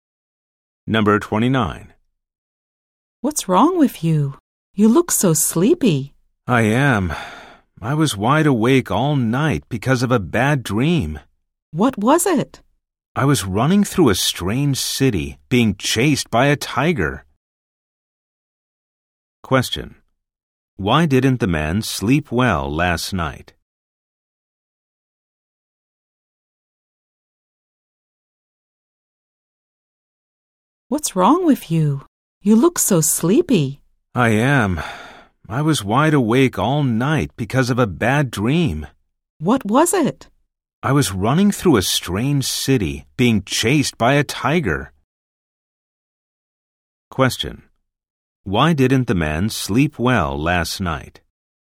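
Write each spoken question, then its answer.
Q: Why didn't the man sleep well last night?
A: He had a bad dream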